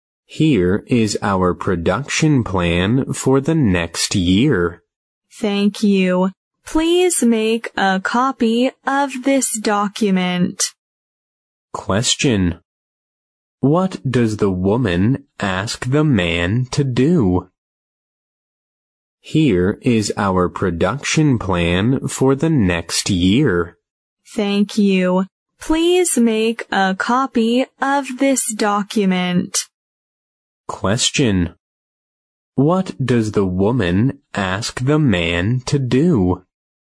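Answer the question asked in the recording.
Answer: Make a copy of the document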